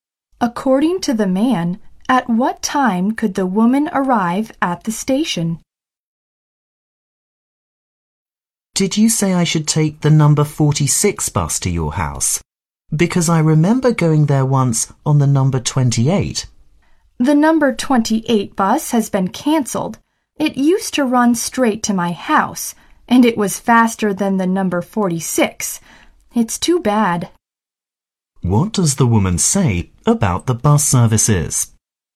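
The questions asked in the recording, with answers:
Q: What does the woman say about the bus services?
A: The number 28 bus, which was faster, has been cancelled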